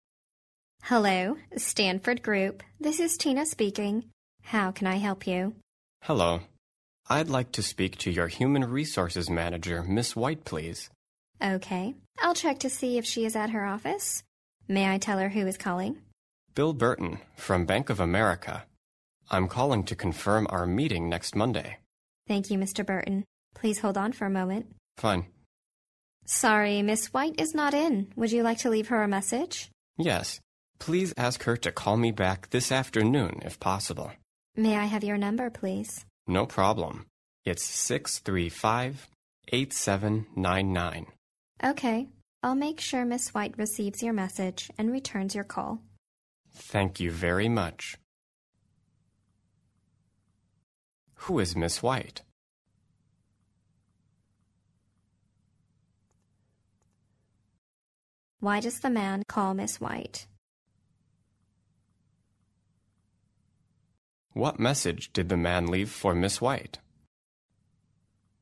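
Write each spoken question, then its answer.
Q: Who is Miss White?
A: The human resources manager of Stanford Group

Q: Why does the man call Miss White?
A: To confirm their meeting next Monday

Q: What message did the man leave for Miss White?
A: Please call him back this afternoon, if possible, at 635-8799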